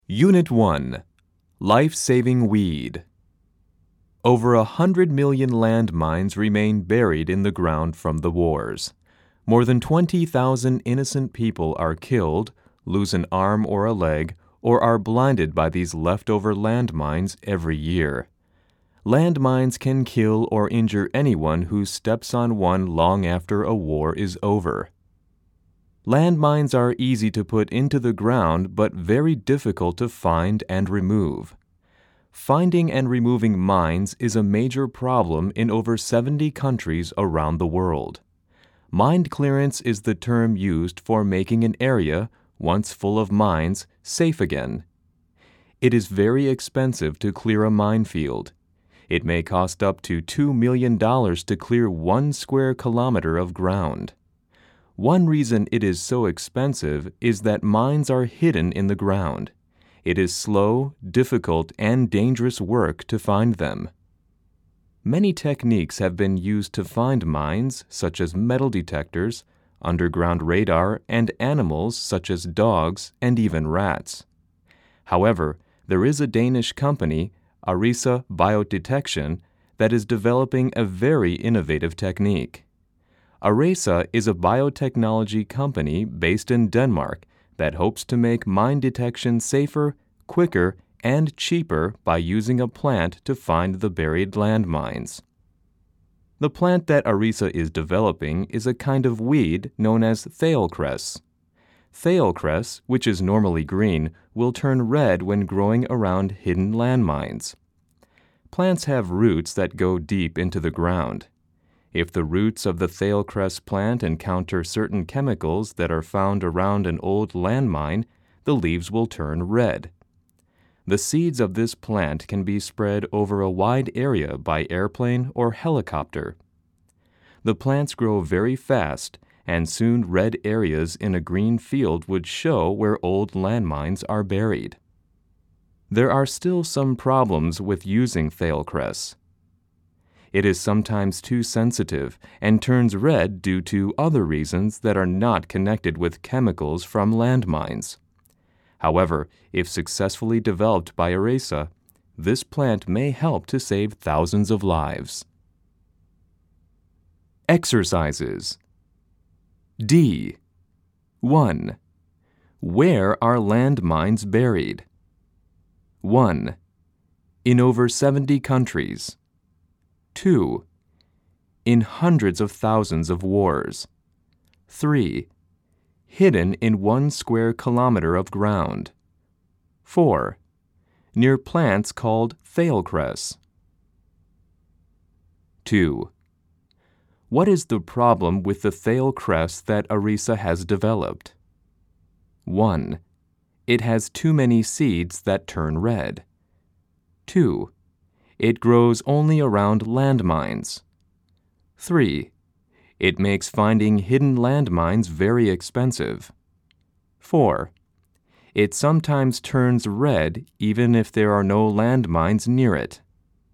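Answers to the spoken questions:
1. 1: In over 70 countries.
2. 4: It sometimes turns red even if there are no landmines near it.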